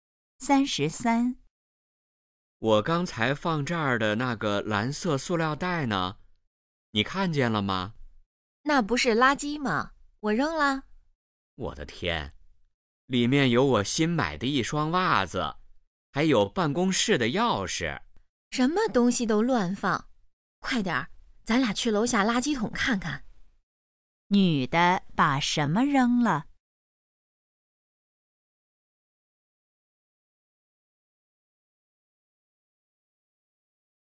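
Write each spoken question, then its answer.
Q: 女的把什么扔了?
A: 一个蓝色塑料袋(里面有袜子和钥匙)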